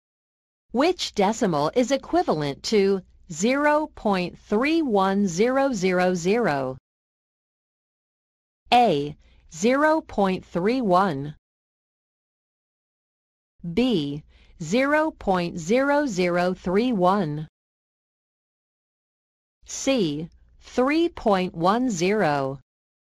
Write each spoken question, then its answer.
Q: Which decimal is equivalent to 0.31000?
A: Answer A, 0.31.